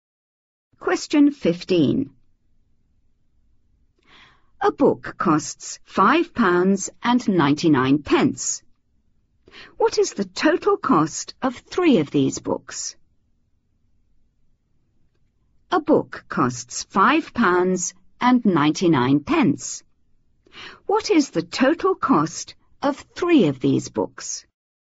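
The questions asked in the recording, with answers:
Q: £5.99. What is the total cost of three of these books?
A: £17.97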